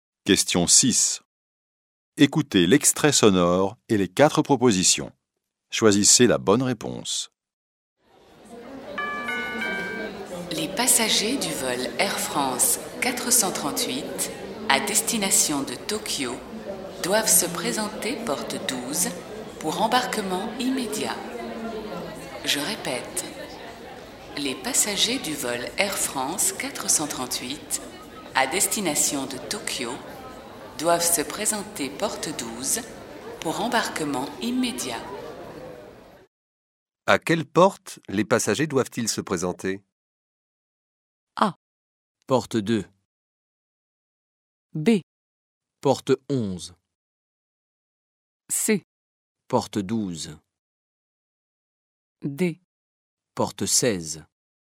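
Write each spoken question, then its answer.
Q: À quelle porte les passagers doivent-ils se présenter?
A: C: Porte 12.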